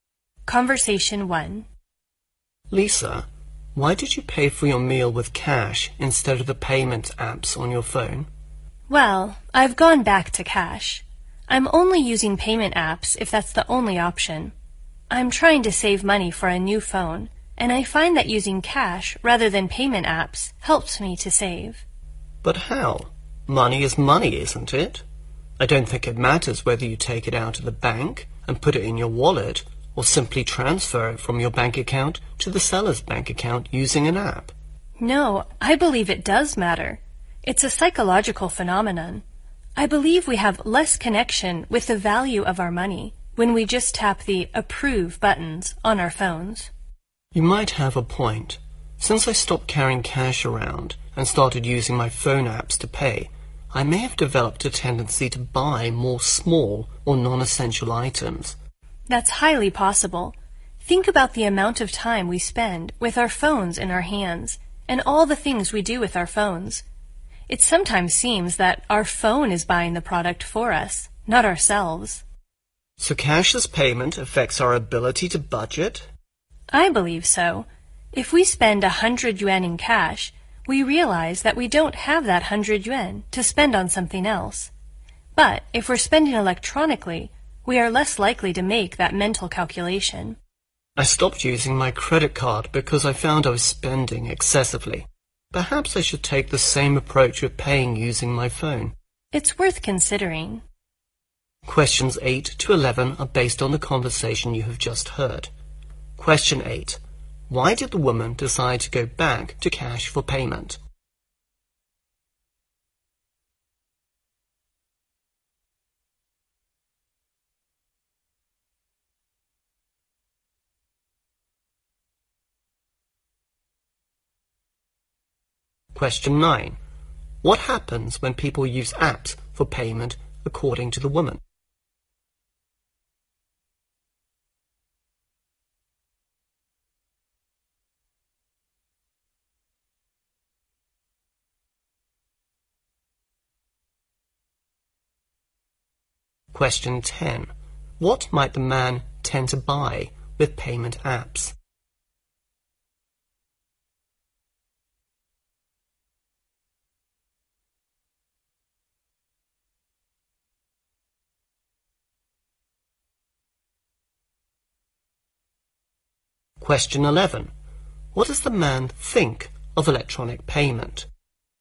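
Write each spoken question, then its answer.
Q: Why did the woman decide to go back to cash for payment?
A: To save money for a new phone

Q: What happens when people use apps for payment according to the woman?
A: They have less connection with the value of their money

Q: What might the man tend to buy with payment apps?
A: Small or non-essential items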